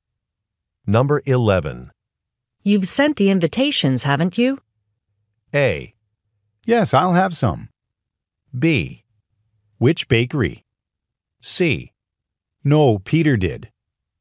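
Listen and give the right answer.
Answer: C: No, Peter did.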